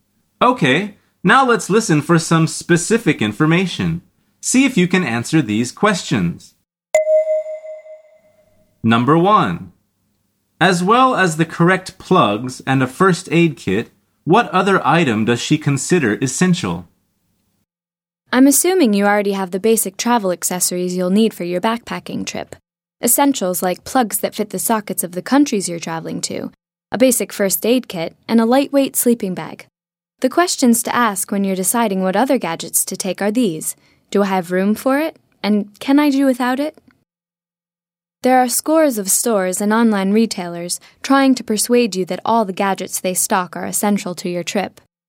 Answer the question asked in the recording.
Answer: The answer is a lightweight sleeping bag.